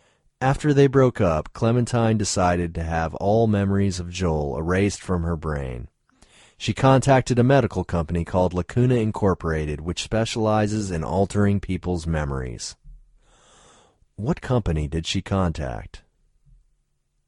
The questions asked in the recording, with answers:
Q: What company did she contact?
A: She contacted Lacuna Incorporated.